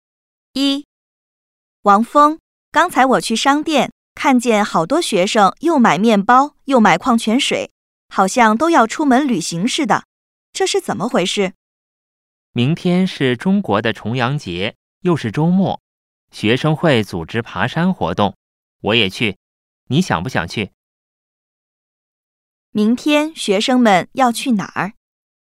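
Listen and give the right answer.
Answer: 去爬山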